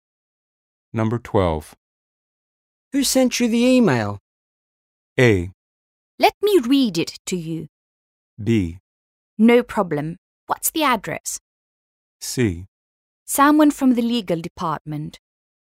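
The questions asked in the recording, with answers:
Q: Who sent you the email?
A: C: Someone from the legal department.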